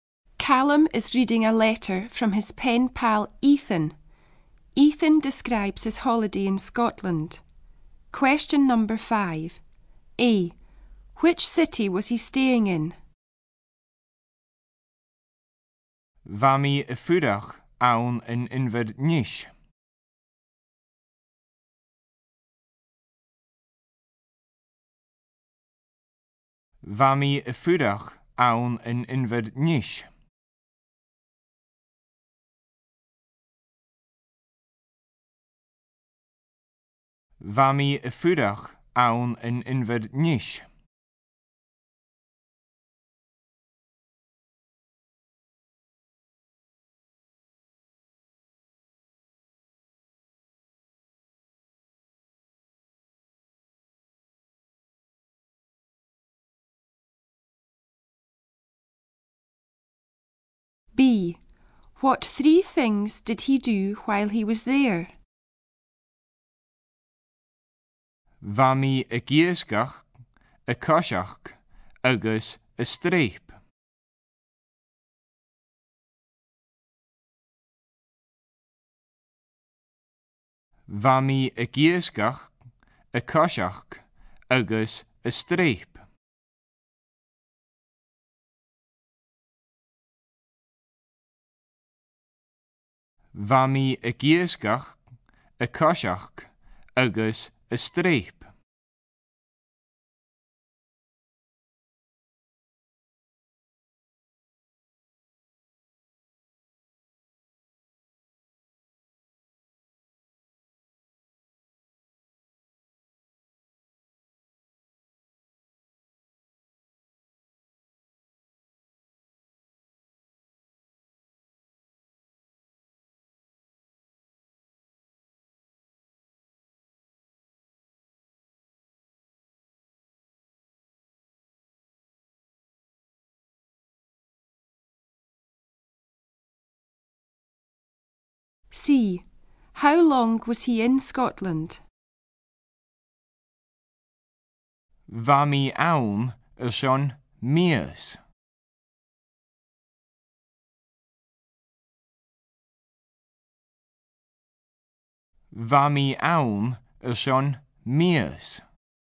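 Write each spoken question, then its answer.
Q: Which city was he staying in?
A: Edinburgh

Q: What three things did he do while he was there?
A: Fishing, walking and climbing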